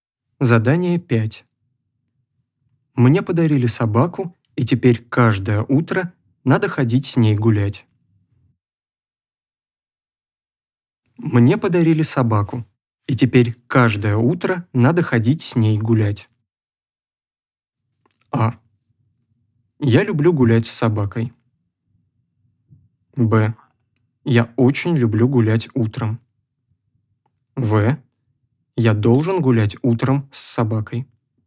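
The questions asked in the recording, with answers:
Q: Мне подарили собаку, и теперь каждое утро надо ходить с ней гулять.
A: В: Я должен гулять утром с собакой.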